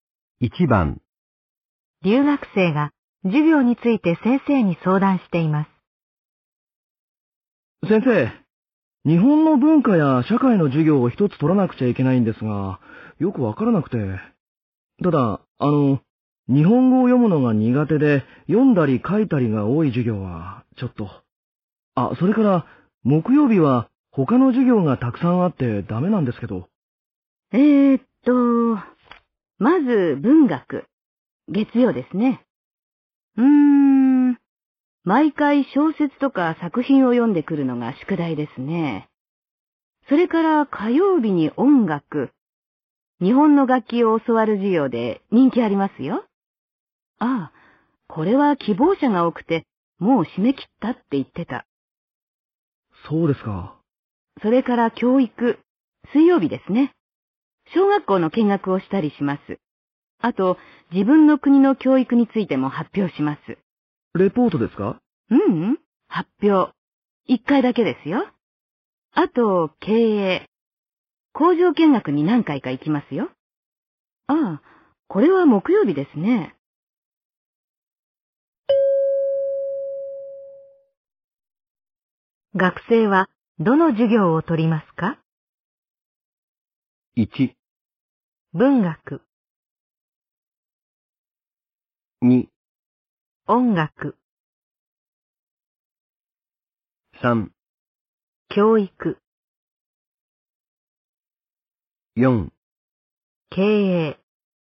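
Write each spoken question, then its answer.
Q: 学生はどの授業を取りますか?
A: 3: 教育。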